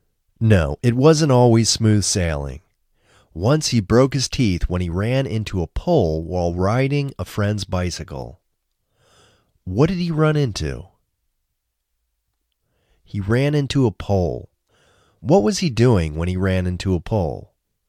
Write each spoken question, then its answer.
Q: What was he doing when he ran into a pole?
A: He was riding a bicycle when he ran into a pole.